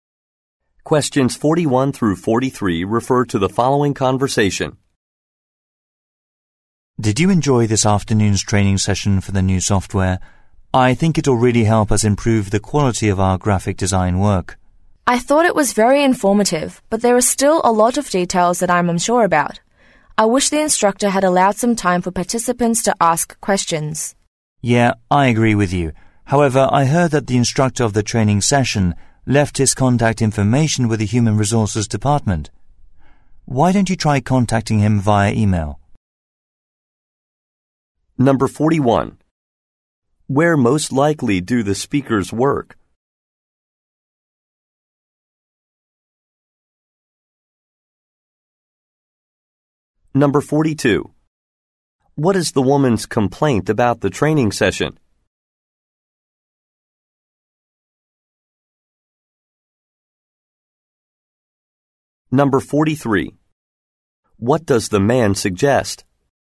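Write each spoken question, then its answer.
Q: Where most likely do the speakers work?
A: At a graphic design company

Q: What is the woman's complaint about the training session?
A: There was no time for questions

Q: What does the man suggest?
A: Emailing the instructor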